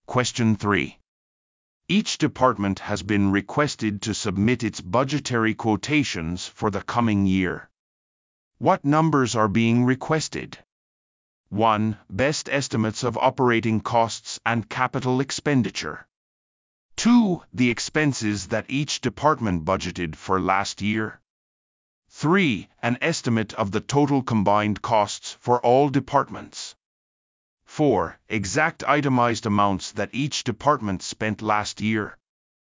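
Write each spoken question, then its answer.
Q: What numbers are being requested?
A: 1: Best estimates of operating costs and capital expenditure.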